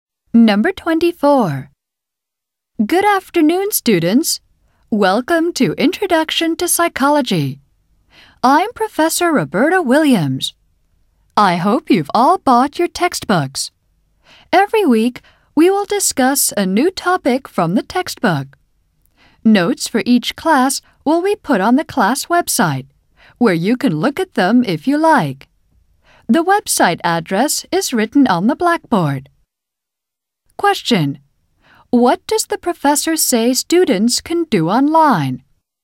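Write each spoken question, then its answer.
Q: What does the professor say students can do online?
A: Look at the notes for each class on the class website.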